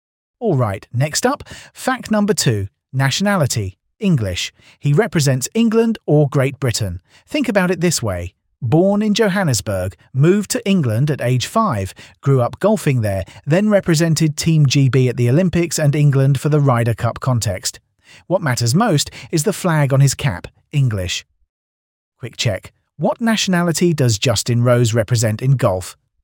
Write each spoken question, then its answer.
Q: What nationality does Justin Rose represent in golf?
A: Correct answer. English.